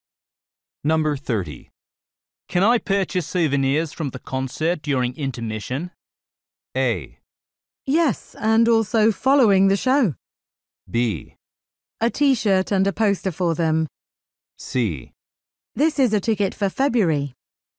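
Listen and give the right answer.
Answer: A: Yes, and also following the show.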